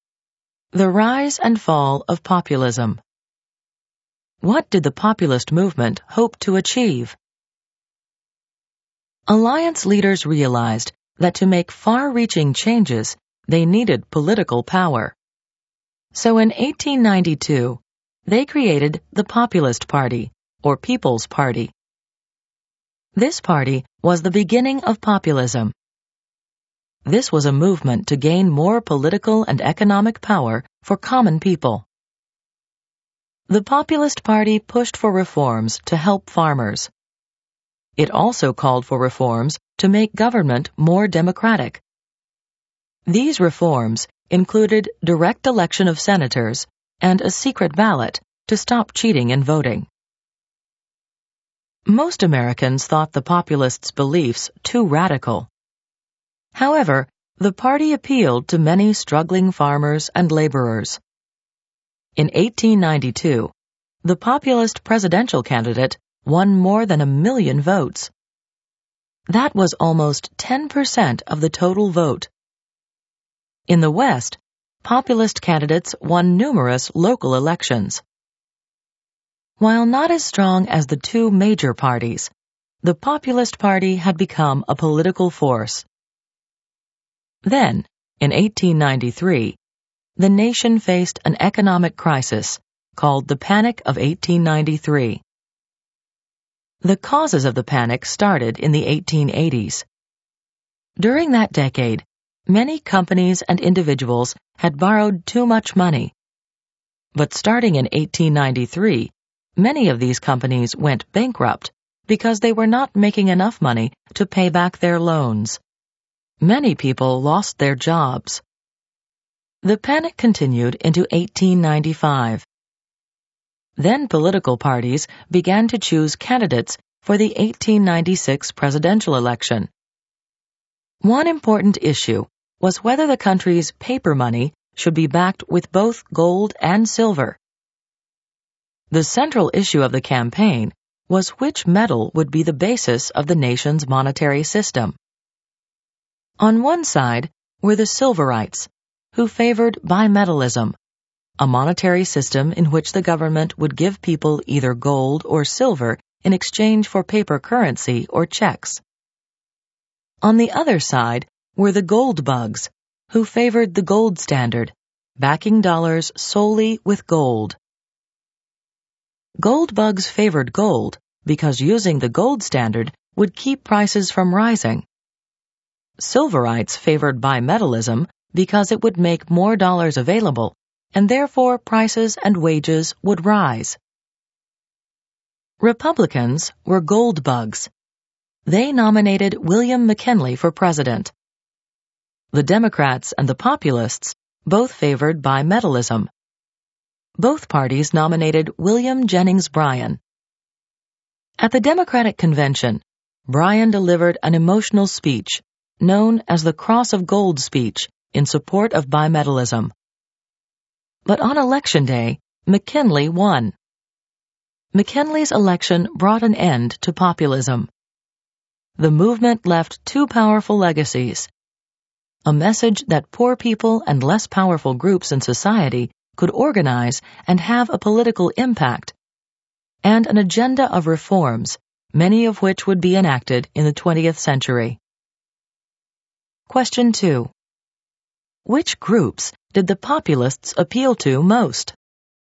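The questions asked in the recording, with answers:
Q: Which groups did the populists appeal to most?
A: Struggling farmers and laborers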